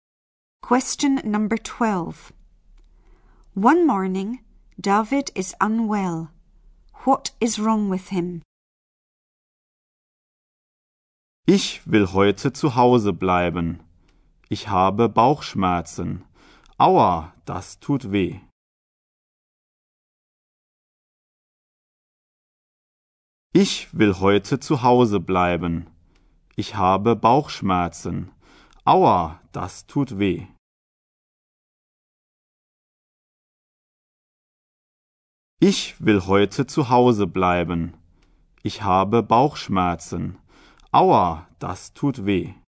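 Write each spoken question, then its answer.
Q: What is wrong with him?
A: He has a stomach ache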